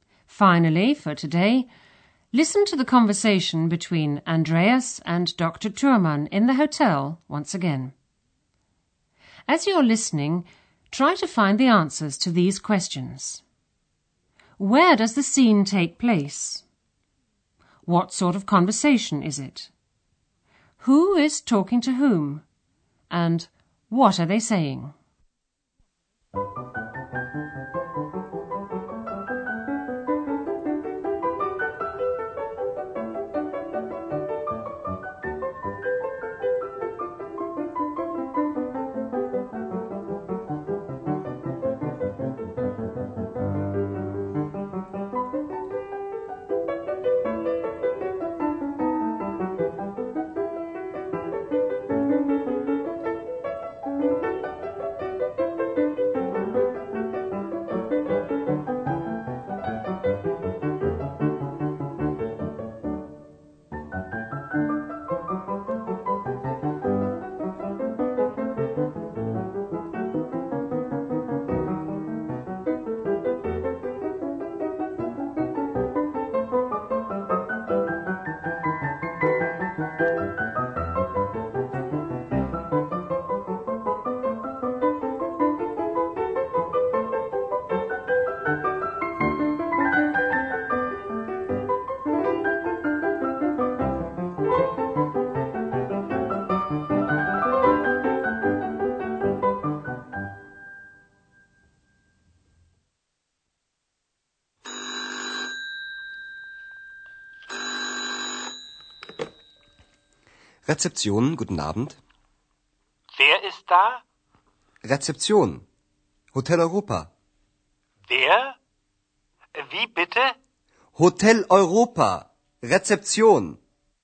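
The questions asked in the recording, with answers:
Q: Where does the scene take place?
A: At the Hotel Europa reception

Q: Who is talking to whom?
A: Andreas and Dr. Thürmann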